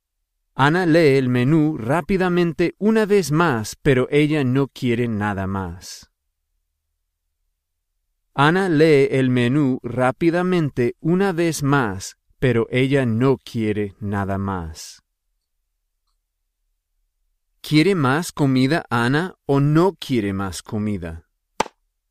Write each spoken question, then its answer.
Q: ¿Quiere más comida Ana o no quiere más comida?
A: En este momento, ella no quiere más comida.